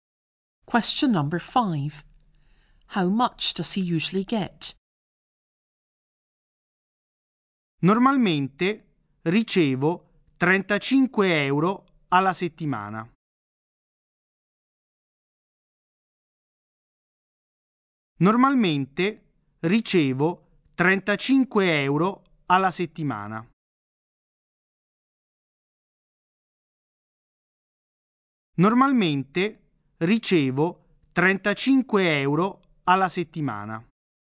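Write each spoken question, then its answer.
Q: How much does he usually get?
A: 35 euros a week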